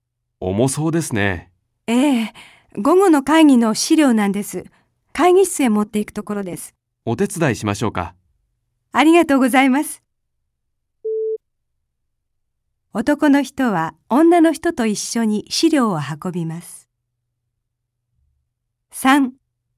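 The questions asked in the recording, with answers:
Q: 男の人は女の人と一緒に資料を運びます。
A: ○(正しい)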